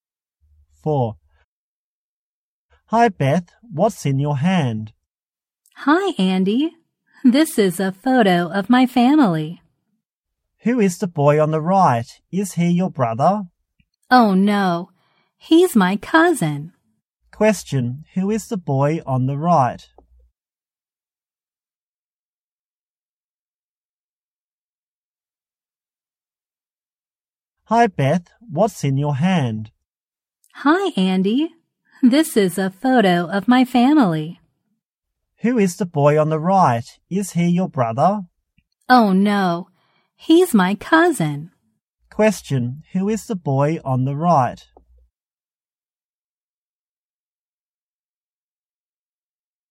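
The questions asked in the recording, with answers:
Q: Who is the boy on the right?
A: Beth's cousin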